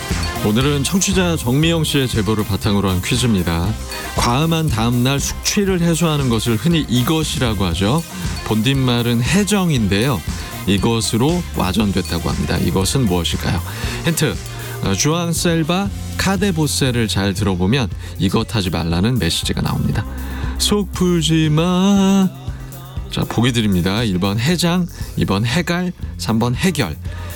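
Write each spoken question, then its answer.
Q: 이것은 무엇일까요?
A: 1번: 해장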